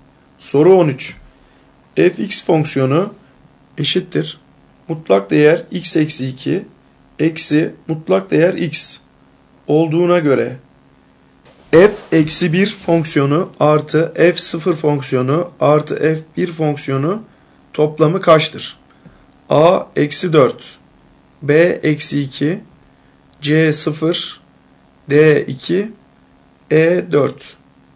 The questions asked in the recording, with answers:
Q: Fx fonksiyonu eşittir mutlak değer x eksi 2 eksi mutlak değer x olduğuna göre f eksi 1 fonksiyonu artı f 0 fonksiyonu artı f 1 fonksiyonu toplamı kaçtır?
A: Doğru cevap E 4.